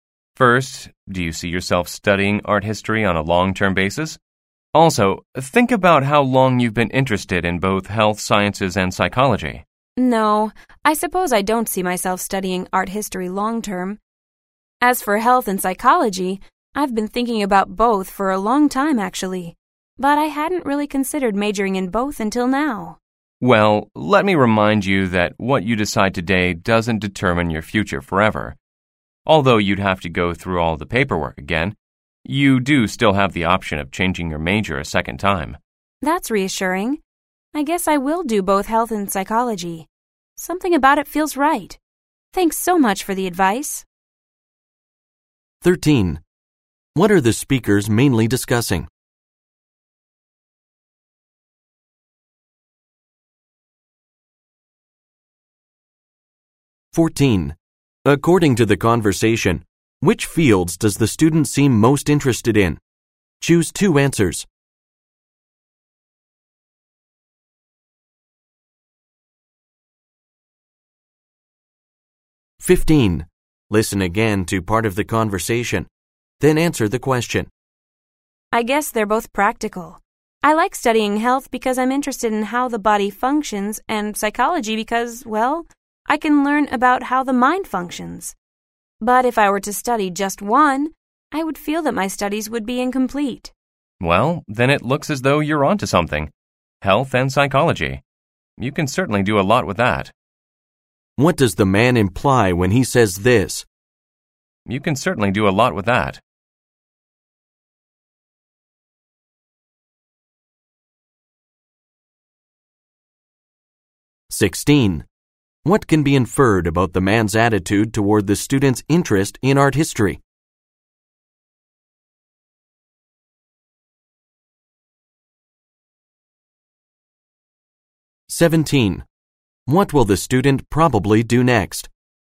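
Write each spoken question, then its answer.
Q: According to the conversation, which fields does the student seem most interested in?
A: Health sciences and psychology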